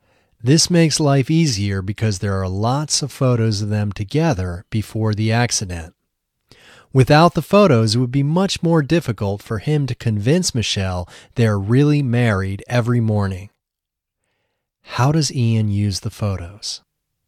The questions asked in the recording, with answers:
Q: How does Ian use the photos?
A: Ian uses the photos to convince Michelle they are really married every morning.